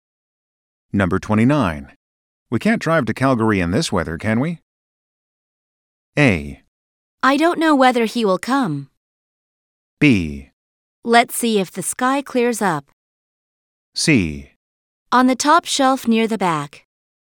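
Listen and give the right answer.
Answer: B: Let's see if the sky clears up.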